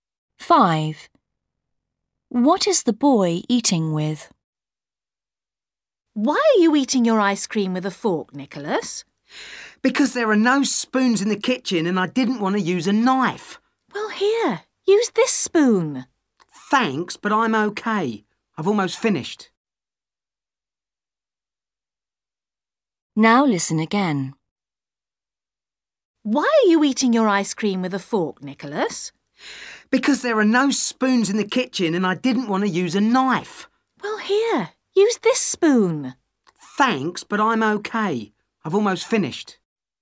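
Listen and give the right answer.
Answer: a fork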